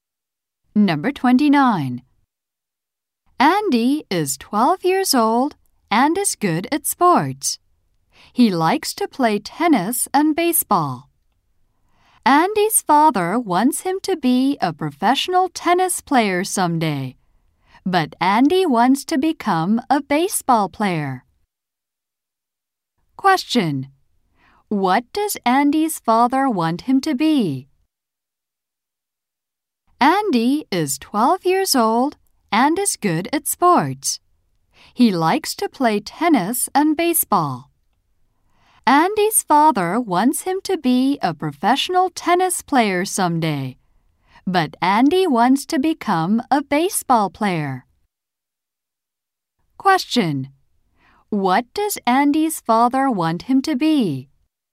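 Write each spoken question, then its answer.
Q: What does Andy's father want him to be?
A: A professional tennis player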